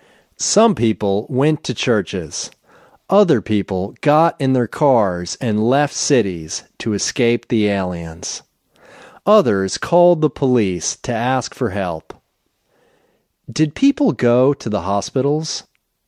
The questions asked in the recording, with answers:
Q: Did people go to the hospitals?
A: No, people didn't go to the hospitals.